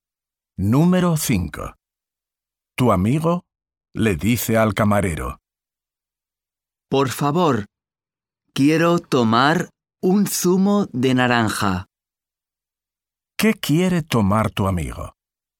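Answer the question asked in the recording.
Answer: Un zumo de naranja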